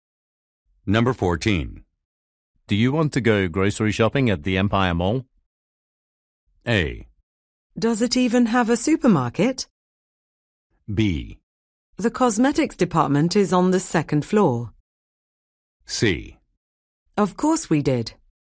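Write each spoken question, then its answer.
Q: Do you want to go grocery shopping at the Empire Mall?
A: A: Does it even have a supermarket?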